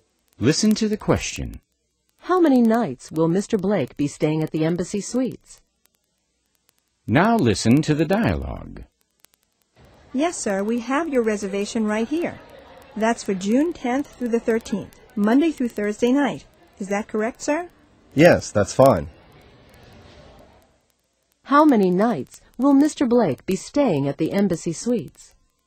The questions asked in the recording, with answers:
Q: How many nights will Mr. Blake be staying at the Embassy Suites?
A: He will be staying 4 nights, Monday through Thursday.